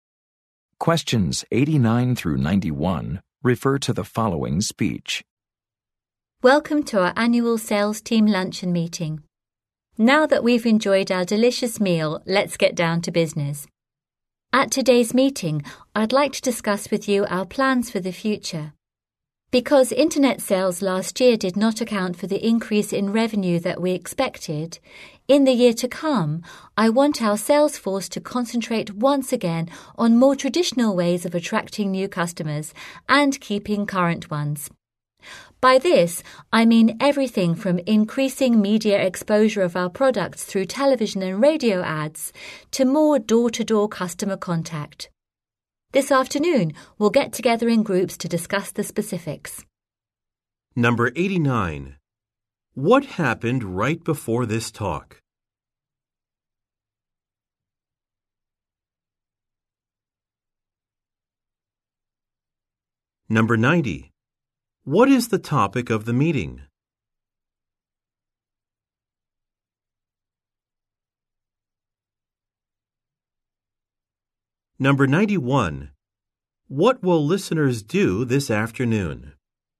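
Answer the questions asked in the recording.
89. They ate a meal (lunch)
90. Future sales plans
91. Meet in groups to discuss the specifics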